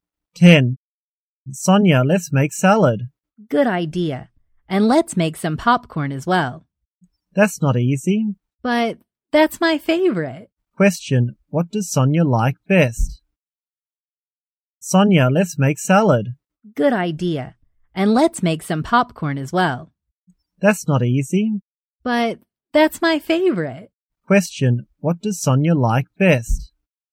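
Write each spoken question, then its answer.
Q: What does Sonia like best?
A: Popcorn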